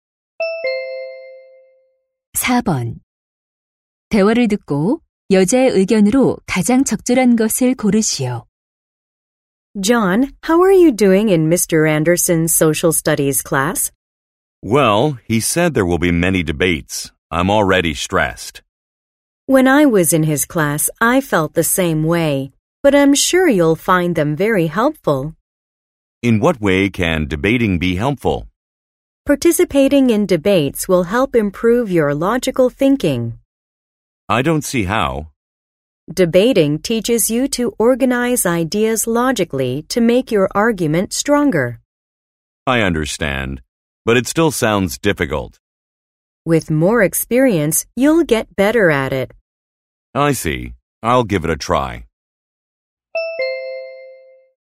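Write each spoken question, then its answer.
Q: 대화를 듣고 여자의 의견으로 가장 적절한 것을 고르시오.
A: 토론은 논리적 사고력 향상에 도움이 된다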